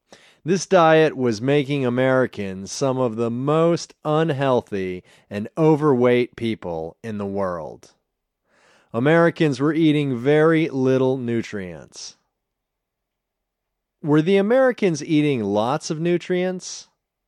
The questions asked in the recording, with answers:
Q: Were the Americans eating lots of nutrients?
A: No, they weren't eating lots of nutrients.